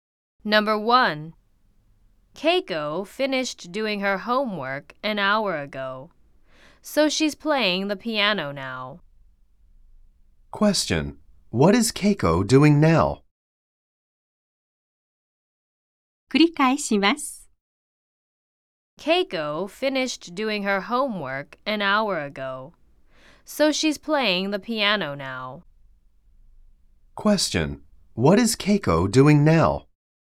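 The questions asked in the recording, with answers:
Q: What is Keiko doing now?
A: She is playing the piano.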